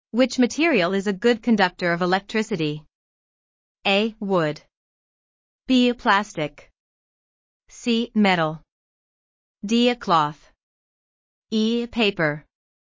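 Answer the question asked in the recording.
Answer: C: Metal.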